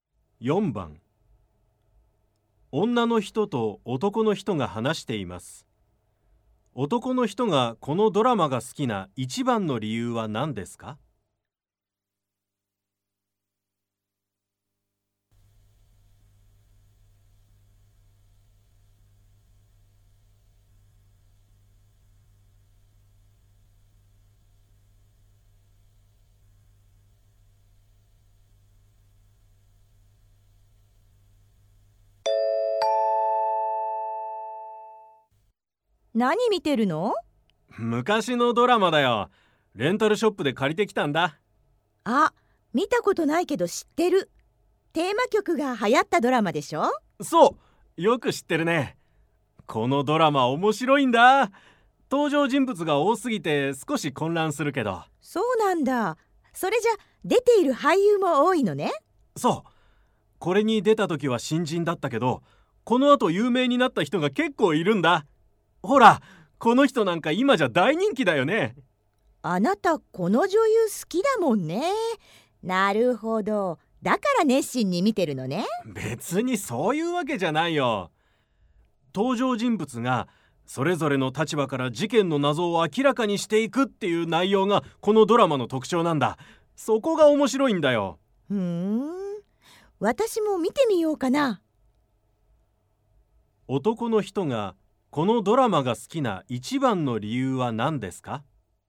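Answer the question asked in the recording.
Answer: 登場人物がそれぞれの立場から事件の謎を明らかにしていく内容だから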